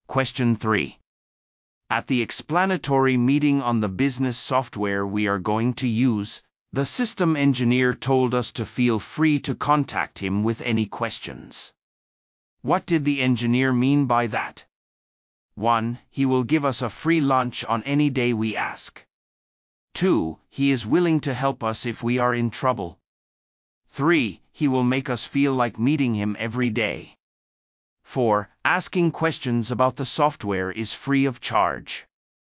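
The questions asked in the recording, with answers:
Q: What did the engineer mean by that?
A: 2: He is willing to help us if we are in trouble.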